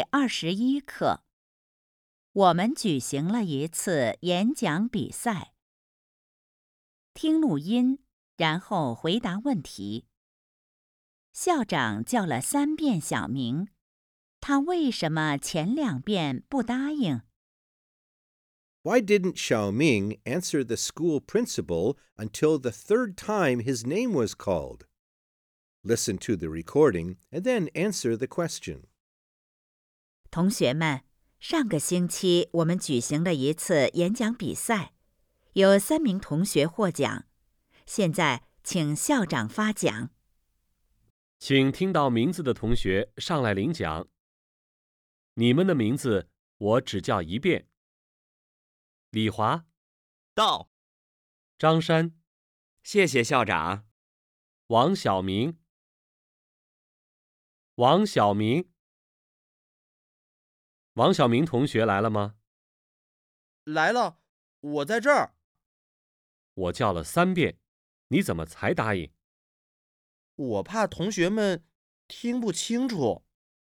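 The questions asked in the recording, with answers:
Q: 校长叫了3遍小明,他为什么前2遍不答应?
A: 他怕同学们听不清楚(想让校长多叫几遍)。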